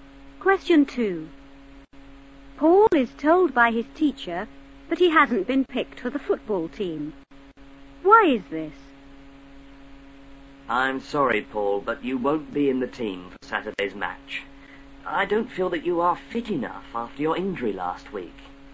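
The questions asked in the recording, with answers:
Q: Why is this?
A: He is not fit enough after his injury last week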